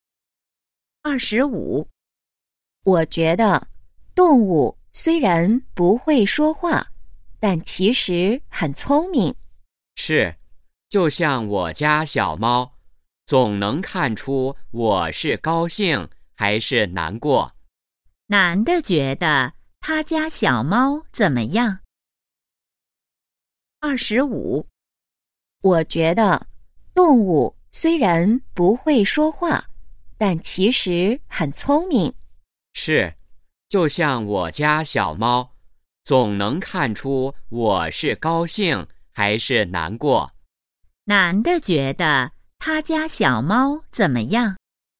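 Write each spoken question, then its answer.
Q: 男的觉得他家小猫怎么样?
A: 很聪明,能看出主人的心情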